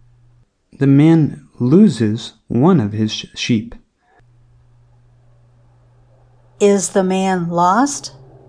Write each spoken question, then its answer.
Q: Is the man lost?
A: No, the sheep is lost.